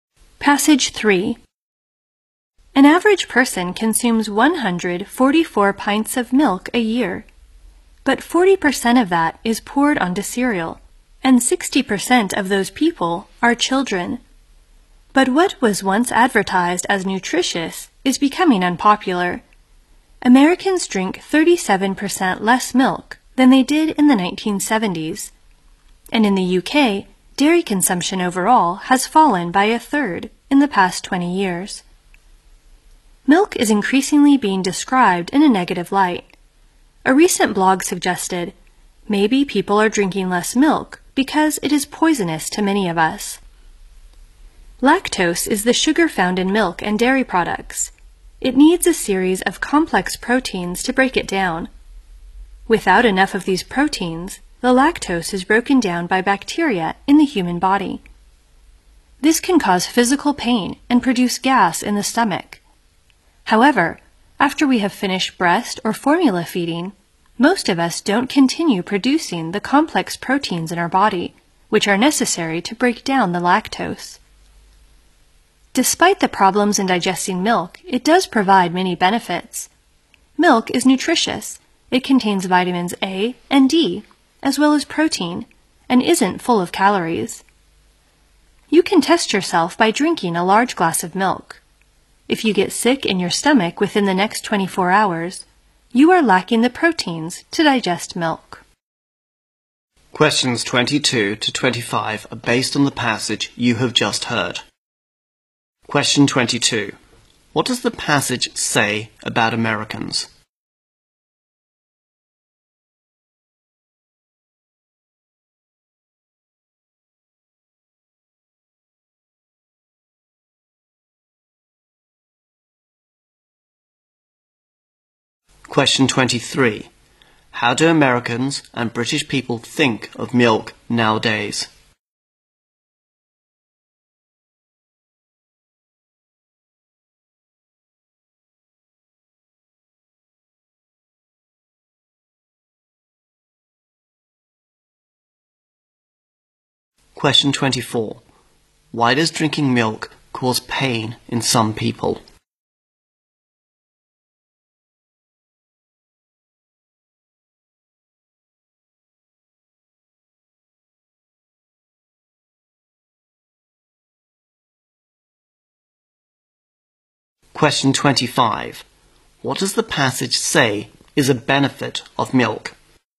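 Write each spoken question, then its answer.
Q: What does the passage say about Americans?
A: They drink 37% less milk than in the 1970s

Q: How do Americans and British people think of milk nowadays?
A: More negatively; it's becoming unpopular

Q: Why does drinking milk cause pain in some people?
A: They lack the proteins needed to break down lactose

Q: What does the passage say is a benefit of milk?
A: It is nutritious, with vitamins A and D and protein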